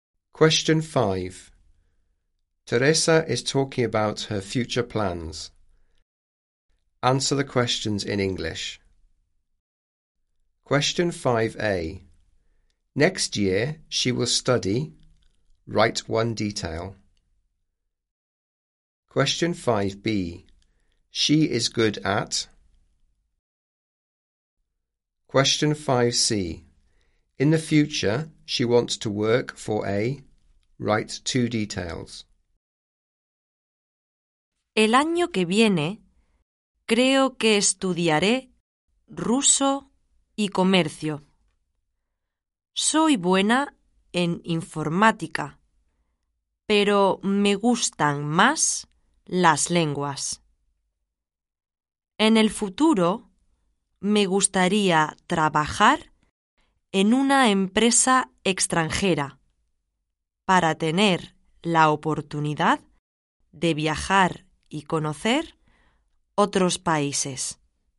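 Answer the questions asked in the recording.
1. Russian and business studies
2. ICT / computing
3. A foreign company, to travel and get to know other countries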